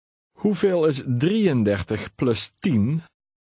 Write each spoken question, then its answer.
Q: Hoeveel is 33 plus 10?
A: 43.